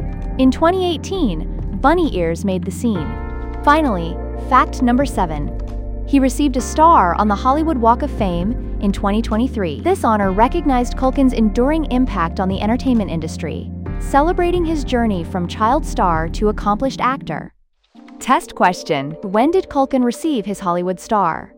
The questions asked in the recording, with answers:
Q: When did Culkin receive his Hollywood star?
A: 2023.